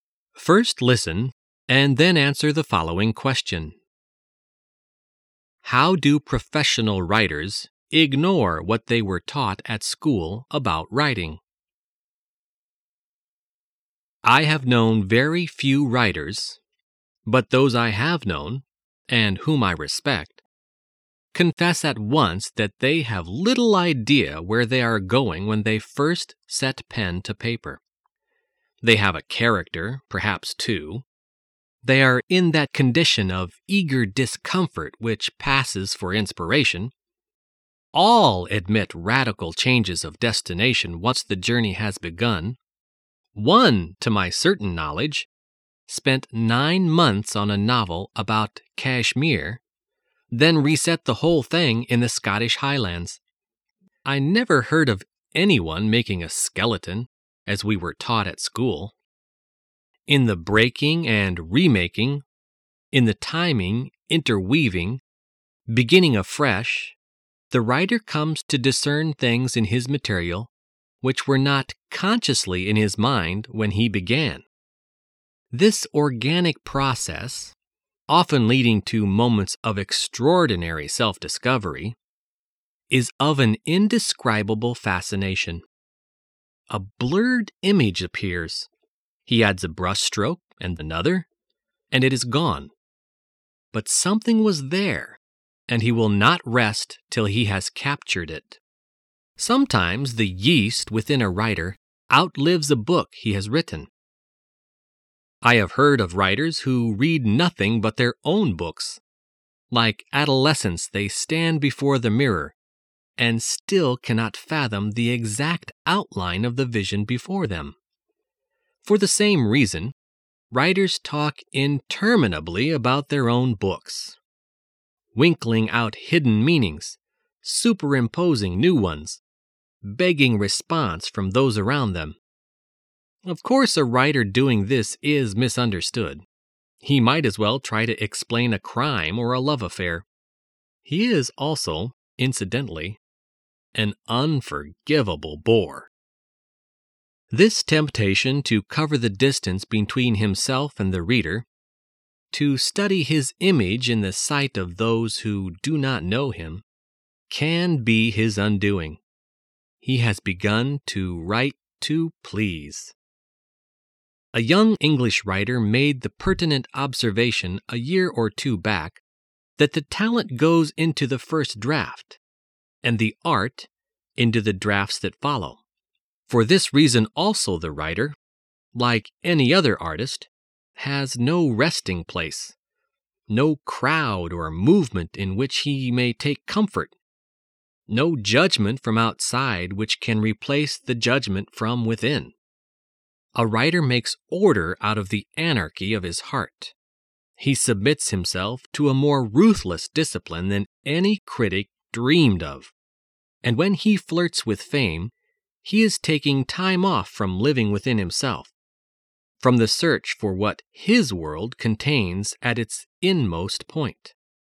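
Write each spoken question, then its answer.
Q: How do professional writers ignore what they were taught at school about writing?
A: They don't make a skeleton (outline) before writing; they start with little idea where they are going.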